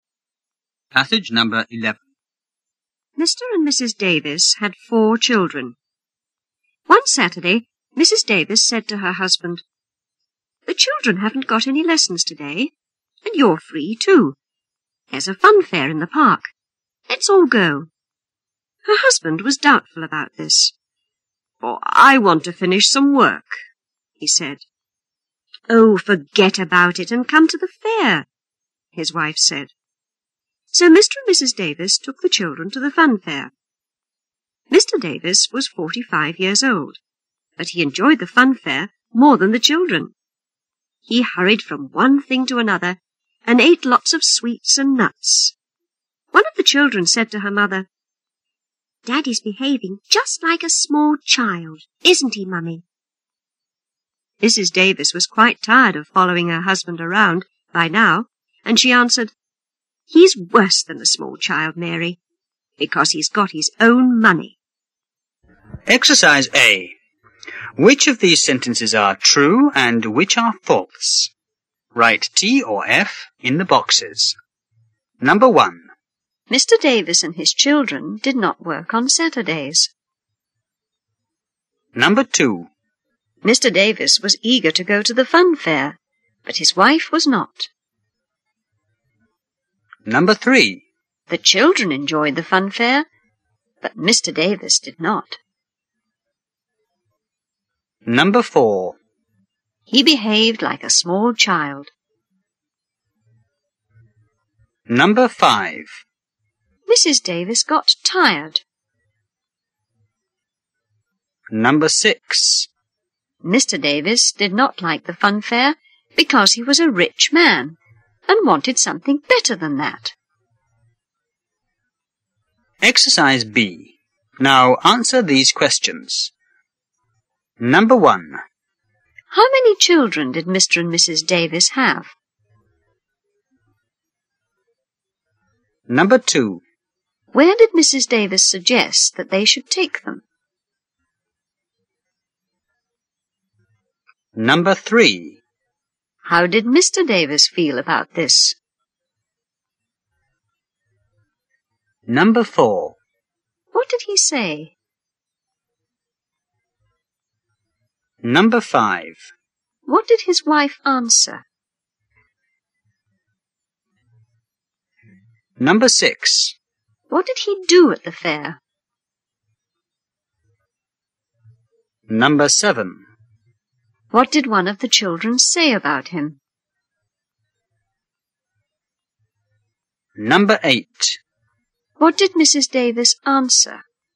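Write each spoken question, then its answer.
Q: Mr. Davis and his children did not work on Saturdays.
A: True

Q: Mr. Davis was eager to go to the fun fair, but his wife was not.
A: False

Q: The children enjoyed the fun fair, but Mr. Davis did not.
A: False

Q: He behaved like a small child.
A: True

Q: Mrs. Davis got tired.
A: True

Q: Mr. Davis did not like the fun fair because he was a rich man and wanted something better than that.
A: False

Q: How many children did Mr. and Mrs. Davis have?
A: Four

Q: Where did Mrs. Davis suggest that they should take them?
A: To the fun fair in the park

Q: How did Mr. Davis feel about this?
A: He was doubtful about it

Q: What did he say?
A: He wanted to finish some work

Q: What did his wife answer?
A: Forget about it and come to the fair

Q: What did he do at the fair?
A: He hurried from one thing to another and ate lots of sweets and nuts

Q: What did one of the children say about him?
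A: Daddy's behaving just like a small child

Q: What did Mrs. Davis answer?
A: He's worse than a small child because he's got his own money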